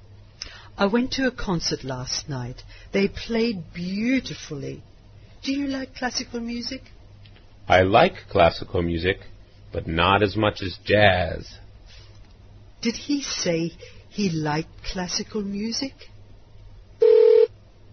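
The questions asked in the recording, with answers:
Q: Did he say he liked classical music?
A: Yes, but not as much as jazz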